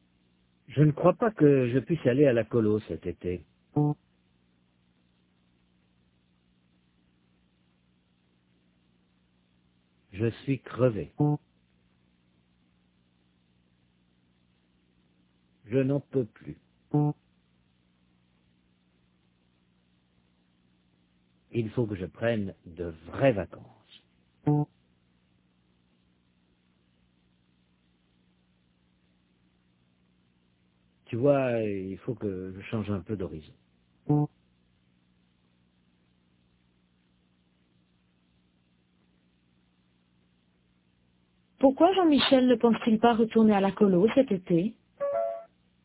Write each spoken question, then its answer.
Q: Pourquoi Jean-Michel ne pense-t-il pas retourner à la colo cet été?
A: Parce qu'il est crevé, il n'en peut plus.